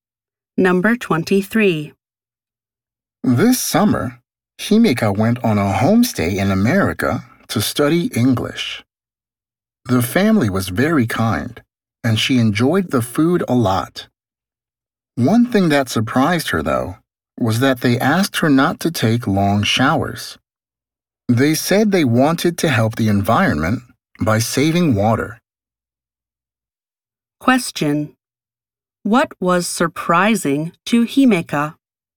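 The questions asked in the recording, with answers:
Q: What was surprising to Himeka?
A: Her host family asked her not to take long showers.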